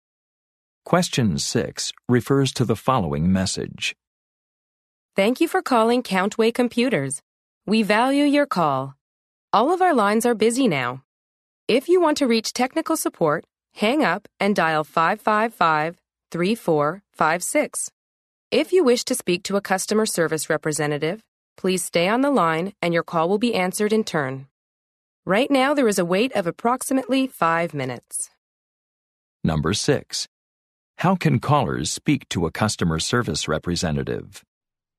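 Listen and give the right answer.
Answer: Stay on the line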